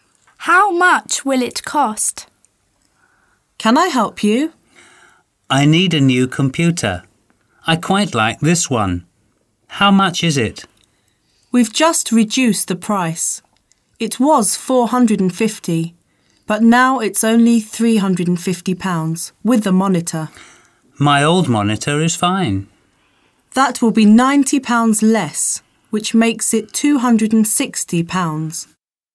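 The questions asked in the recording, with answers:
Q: How much will it cost?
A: £260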